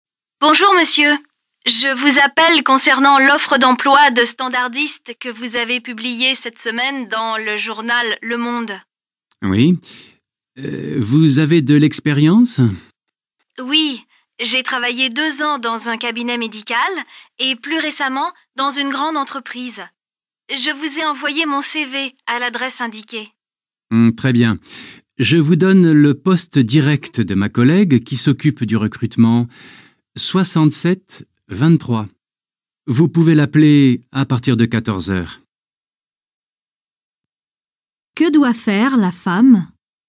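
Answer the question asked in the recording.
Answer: Appeler la collègue chargée du recrutement (poste 67 23) à partir de 14 heures.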